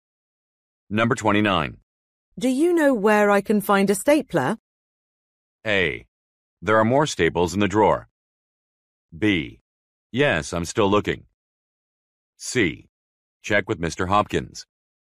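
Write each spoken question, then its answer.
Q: Do you know where I can find a stapler?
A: C: Check with Mr. Hopkins.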